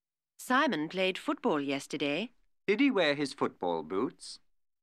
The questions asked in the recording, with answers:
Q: Did he wear his football boots?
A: Yes, he did.